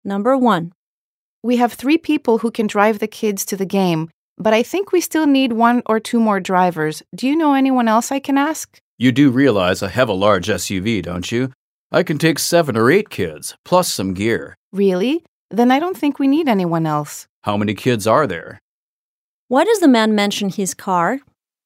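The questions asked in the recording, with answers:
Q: Why does the man mention his car?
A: He is offering to drive; his large SUV can take 7 or 8 kids plus gear.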